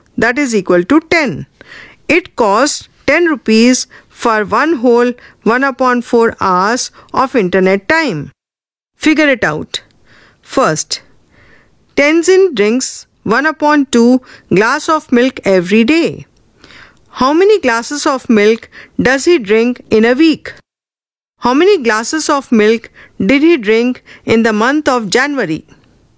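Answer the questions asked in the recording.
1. 3 1/2 glasses
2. 15 1/2 glasses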